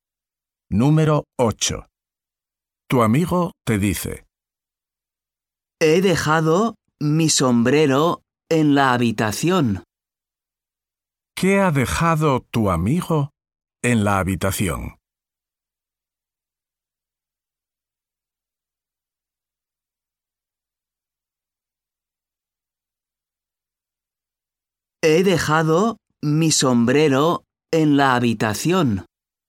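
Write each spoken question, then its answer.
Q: ¿Qué ha dejado tu amigo en la habitación?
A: Su sombrero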